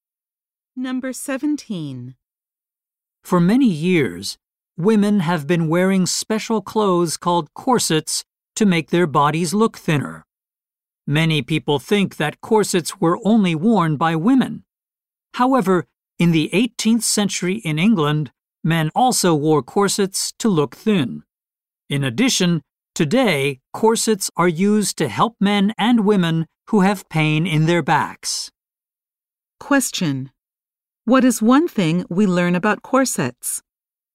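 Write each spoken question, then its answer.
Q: What is one thing we learn about corsets?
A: Men in 18th-century England also wore them.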